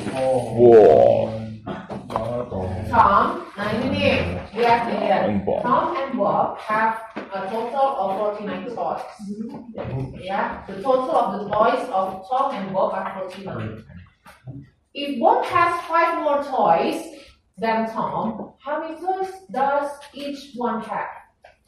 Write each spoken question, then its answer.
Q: If Bob has five more toys than Tom, how many toys does each one have?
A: So Tom has 22 toys and Bob has 27 toys.